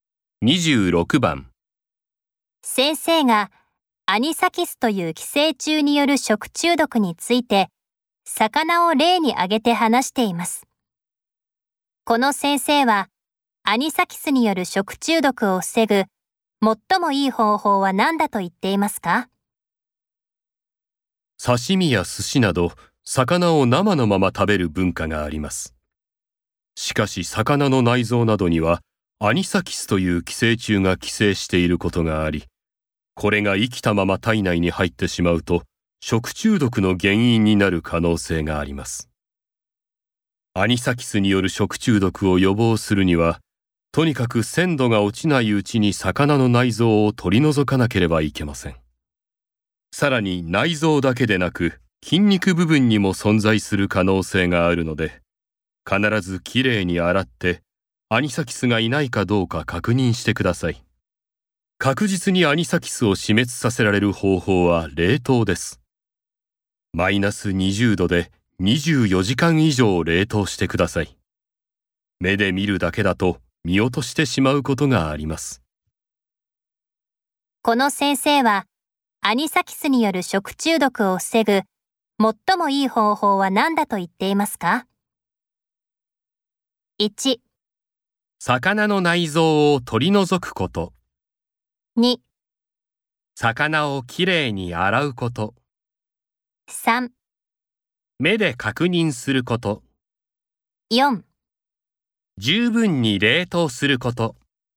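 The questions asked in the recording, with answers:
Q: この先生はアニサキスによる食中毒を防ぐ最もいい方法は何だと言っていますか?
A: 4: 十分に冷凍すること。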